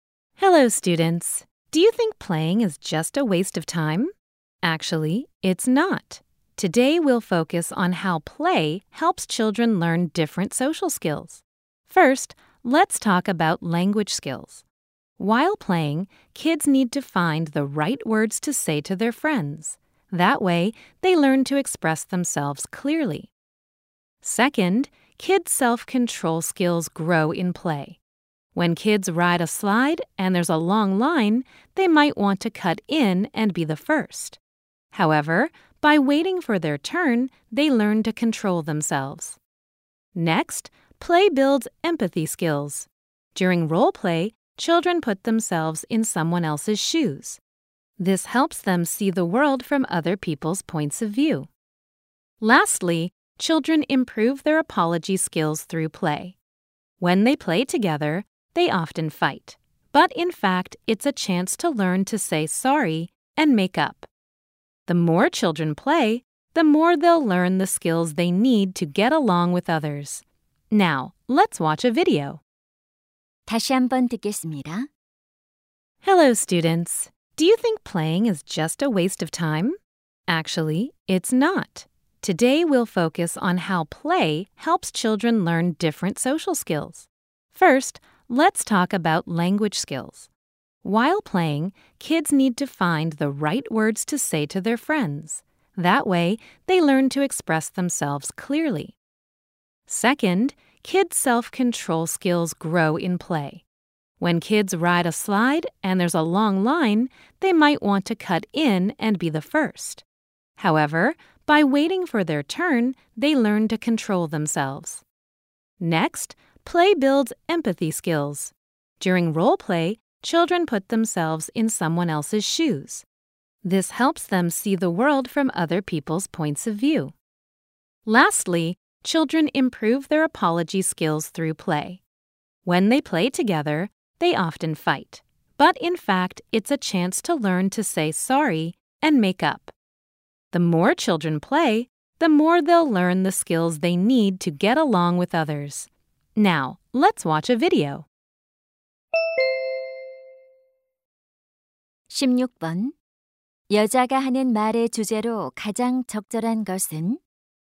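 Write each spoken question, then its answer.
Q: 여자가 하는 말의 주제로 가장 적절한 것은?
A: 놀이가 아이들의 다양한 사회적 기술 학습에 도움이 되는 방식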